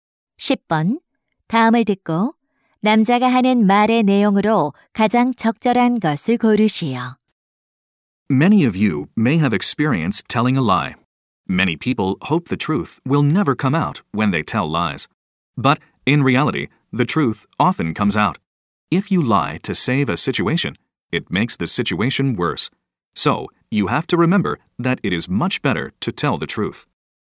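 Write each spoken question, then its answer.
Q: 다음을 듣고 남자가 하는 말의 내용으로 가장 적절한 것을 고르시오.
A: 거짓말보다 진실을 말하는 것이 훨씬 낫다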